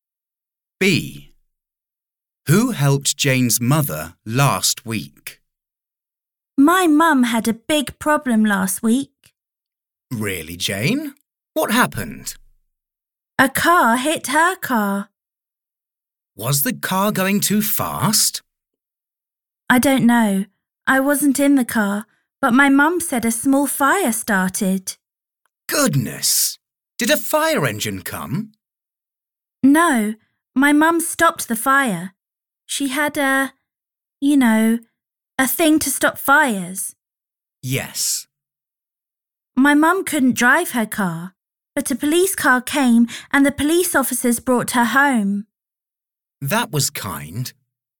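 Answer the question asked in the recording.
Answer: Police officers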